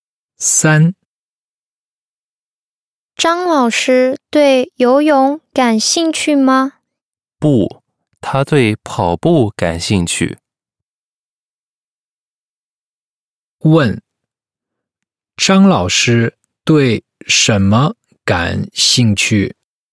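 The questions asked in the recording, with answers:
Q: 张老师对什么感兴趣?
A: 跑步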